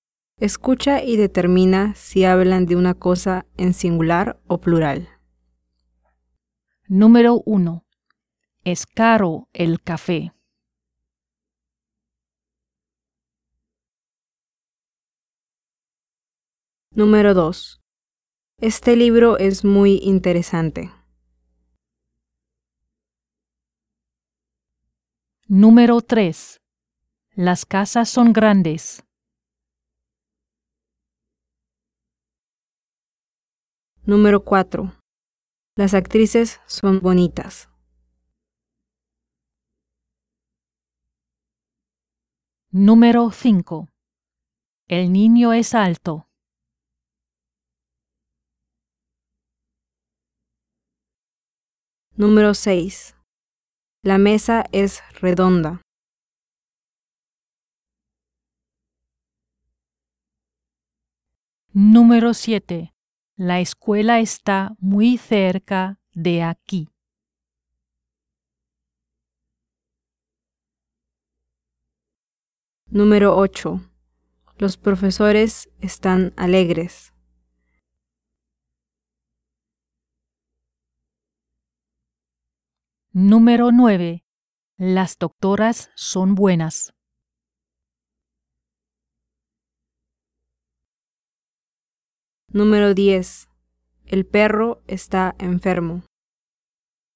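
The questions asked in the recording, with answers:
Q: Número 1. Es caro el café.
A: singular

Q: Número 2. Este libro es muy interesante.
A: singular

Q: Número 3. Las casas son grandes.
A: plural

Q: Número 4. Las actrices son bonitas.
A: plural

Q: Número 5. El niño es alto.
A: singular

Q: Número 6. La mesa es redonda.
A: singular

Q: Número 7. La escuela está muy cerca de aquí.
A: singular

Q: Número 8. Los profesores están alegres.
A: plural

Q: Número 9. Las doctoras son buenas.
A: plural

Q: Número 10. El perro está enfermo.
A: singular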